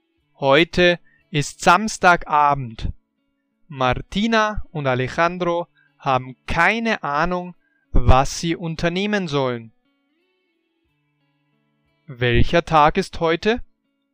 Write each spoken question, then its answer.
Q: Welcher Tag ist heute?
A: Samstag. Heute ist Samstag.